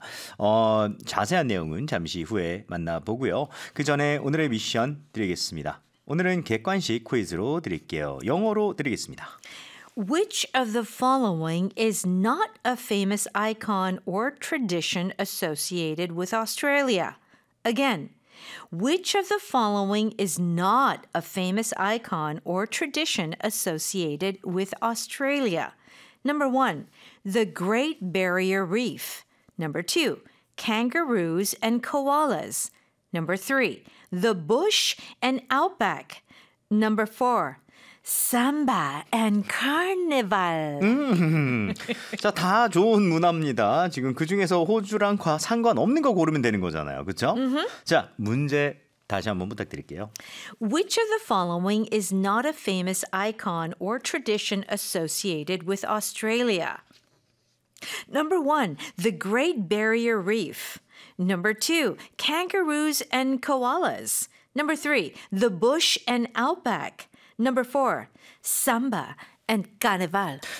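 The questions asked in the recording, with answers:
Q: Which of the following is not a famous icon or tradition associated with Australia?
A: 4: samba and carnival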